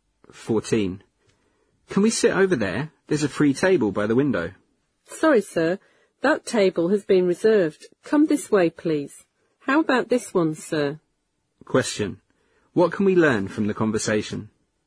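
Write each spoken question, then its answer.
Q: What can we learn from the conversation?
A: They can't sit at the window table because it is reserved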